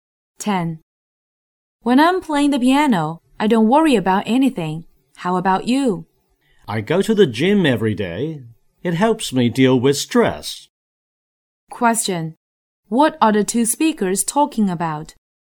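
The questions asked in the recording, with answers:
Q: What are the two speakers talking about?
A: Ways to relieve stress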